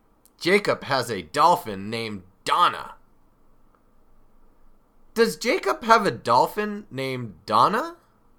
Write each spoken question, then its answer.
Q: Does Jacob have a dolphin named Donna?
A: Yes, he does. Jacob has a dolphin named Donna.